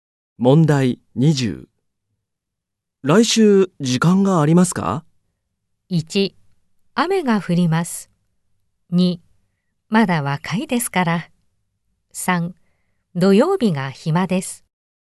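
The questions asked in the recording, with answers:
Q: 来週時間がありますか?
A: 1: 土曜日が暇です。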